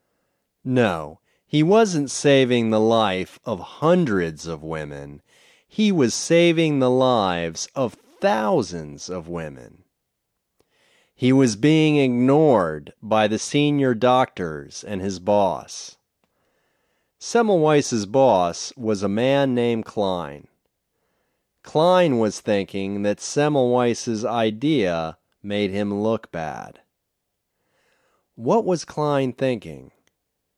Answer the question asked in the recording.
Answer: Klein was thinking that Semmelweis's idea made him look bad.